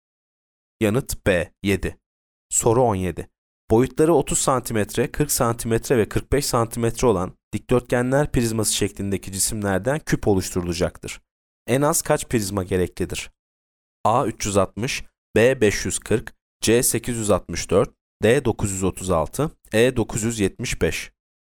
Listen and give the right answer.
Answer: Yanıt C 864.